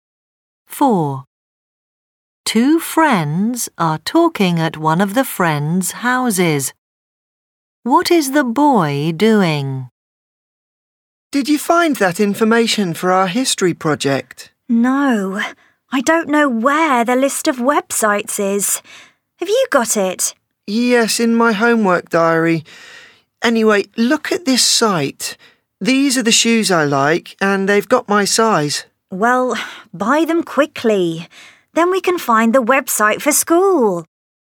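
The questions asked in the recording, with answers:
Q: What is the boy doing?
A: Looking at shoes to buy online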